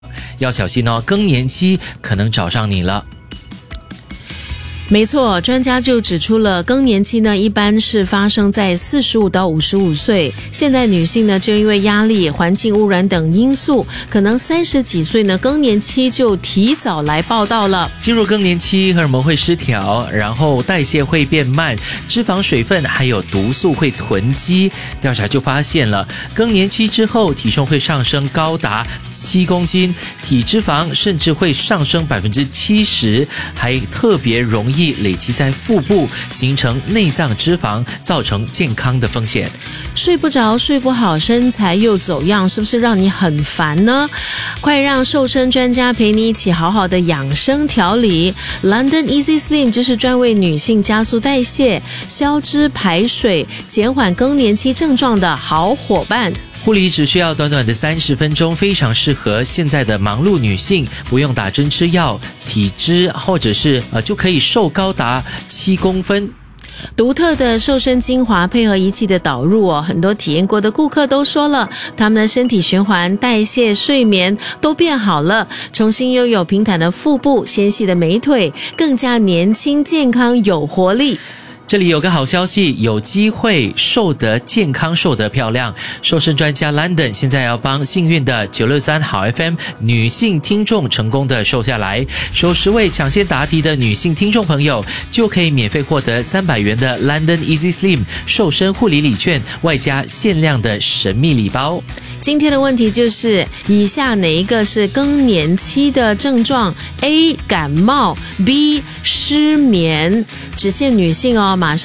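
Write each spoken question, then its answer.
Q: 以下哪一个是更年期的症状? A 感冒, B 失眠,只限女性哦。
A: B: 失眠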